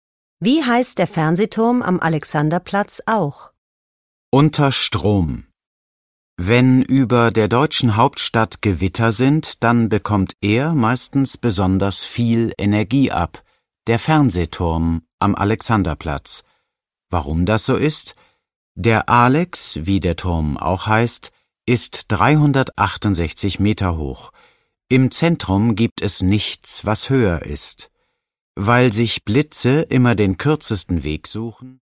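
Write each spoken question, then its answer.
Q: Wie heißt der Fernsehturm am Alexanderplatz auch?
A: der Alex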